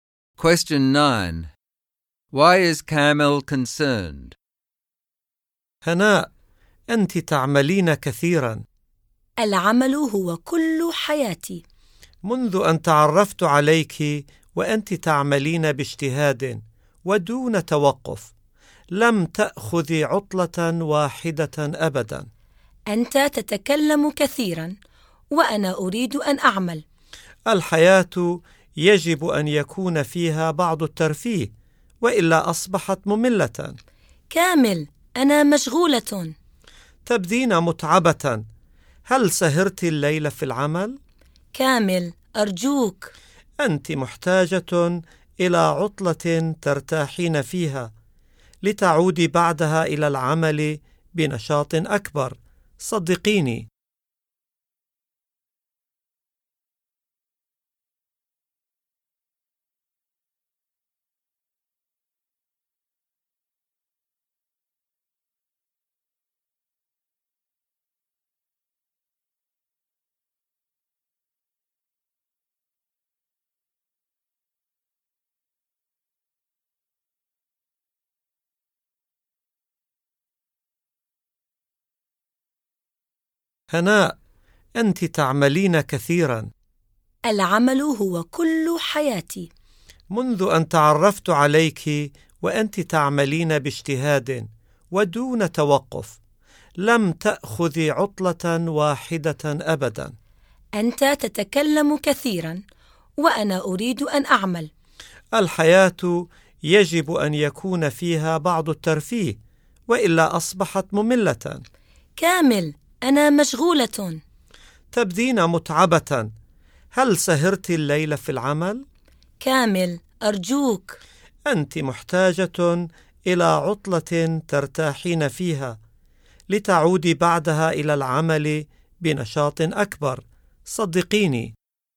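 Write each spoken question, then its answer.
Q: Why is Kamal concerned?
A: Hana works too much without ever taking a holiday, looks tired and needs a break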